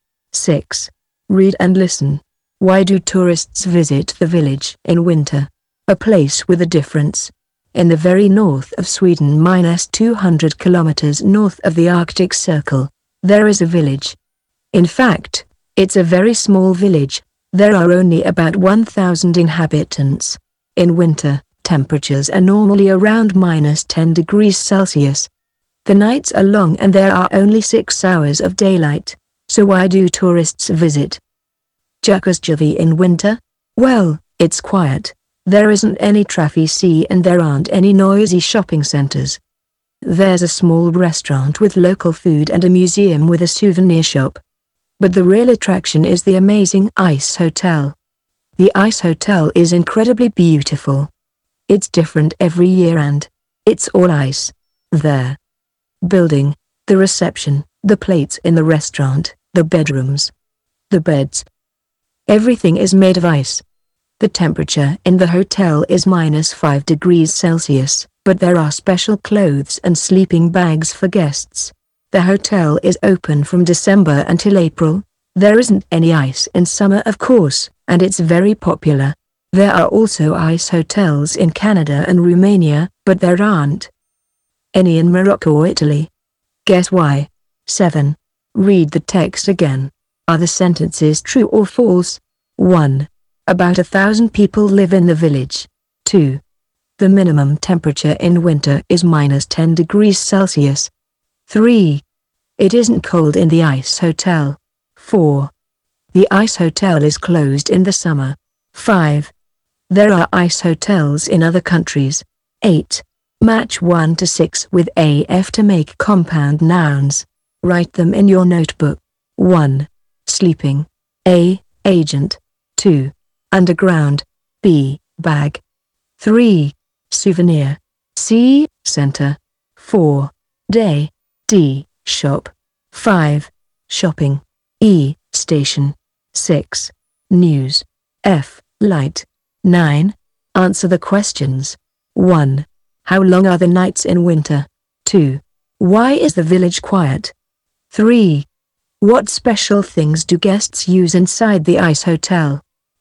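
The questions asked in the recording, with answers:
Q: Why do tourists visit the village in winter?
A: It's quiet, and the real attraction is the amazing ice hotel

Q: About 1,000 people live in the village.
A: True

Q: It isn't cold in the ice hotel.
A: False

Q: The ice hotel is closed in the summer.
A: True

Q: There are ice hotels in other countries.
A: True

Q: Why is the village quiet?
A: There isn't any traffic and there aren't any noisy shopping centres

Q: What special things do guests use inside the ice hotel?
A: Special clothes and sleeping bags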